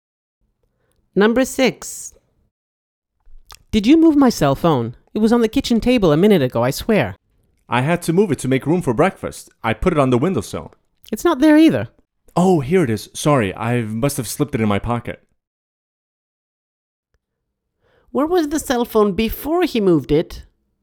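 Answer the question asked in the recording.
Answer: On the kitchen table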